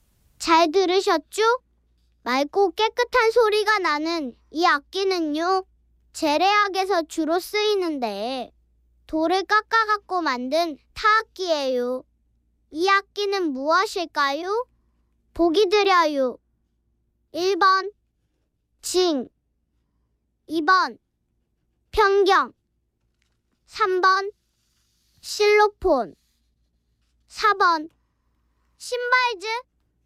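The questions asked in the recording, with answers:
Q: 이 악기는 무엇일까요?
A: 2: 편경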